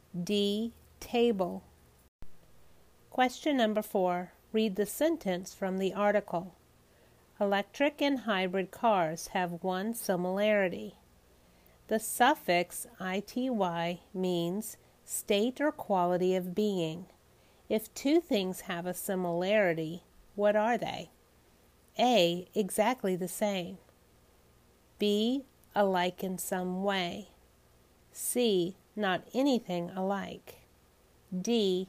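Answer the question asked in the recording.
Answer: B: Alike in some way.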